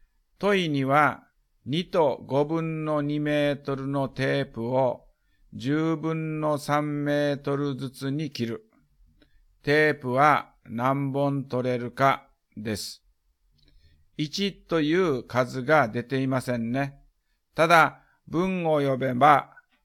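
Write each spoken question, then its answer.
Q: 問には、2と5分の2メートルのテープを10分の3メートルずつに切る。テープは何本取れるかです。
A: 8本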